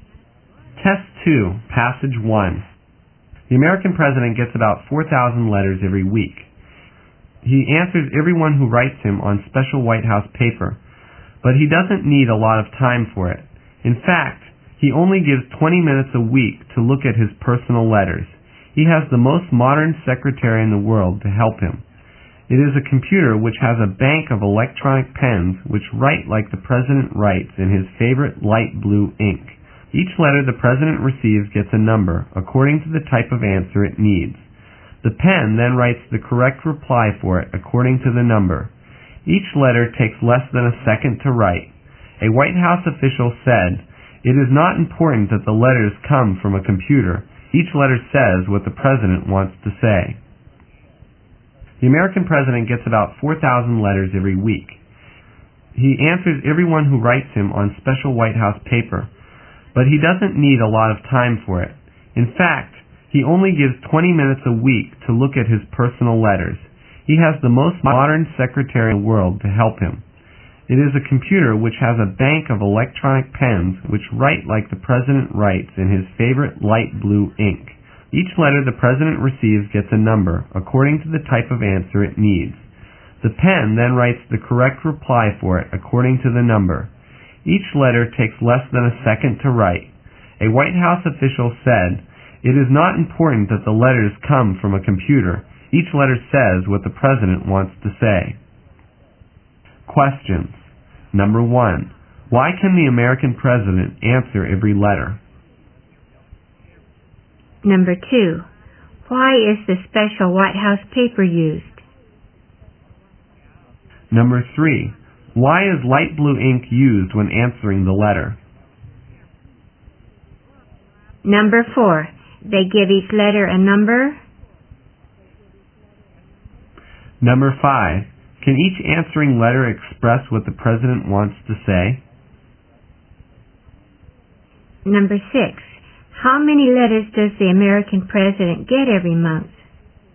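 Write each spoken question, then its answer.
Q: Why can the American president answer every letter?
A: A computer helps him write the replies

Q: Can each answering letter express what the president wants to say?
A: Yes

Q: How many letters does the American president get every month?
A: About 16,000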